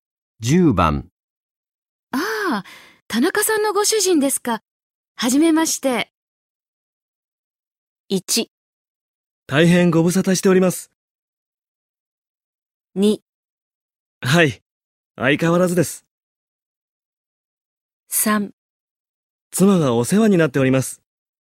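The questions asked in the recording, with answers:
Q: ああ、田中さんのご主人ですか。はじめまして。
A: 3: 妻がお世話になっております。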